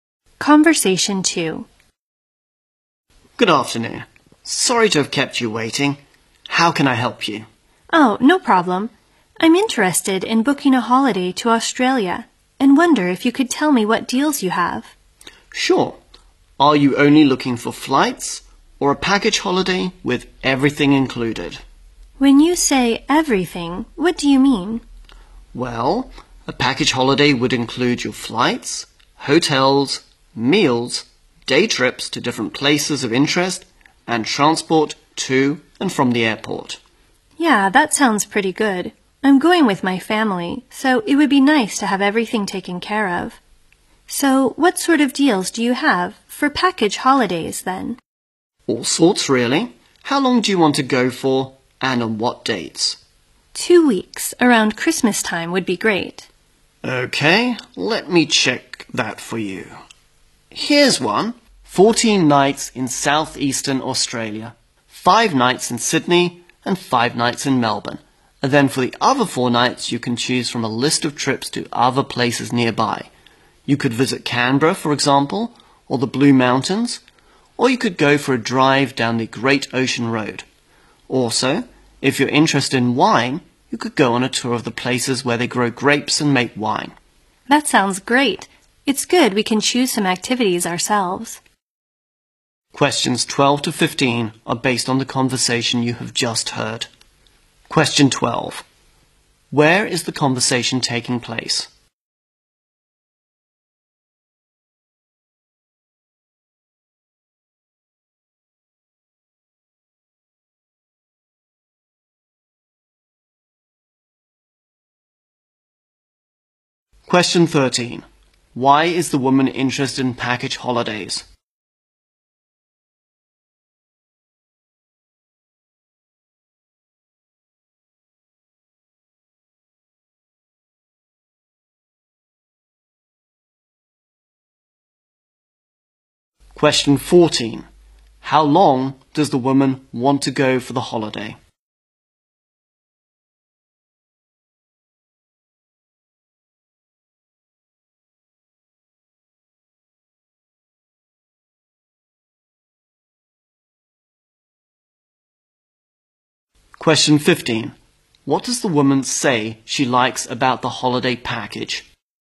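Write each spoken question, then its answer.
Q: Where is the conversation taking place?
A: At a travel agency

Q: Why is the woman interested in package holidays?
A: She's going with her family and wants everything taken care of

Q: How long does the woman want to go for the holiday?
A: Two weeks

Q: What does the woman say she likes about the holiday package?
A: They can choose some activities themselves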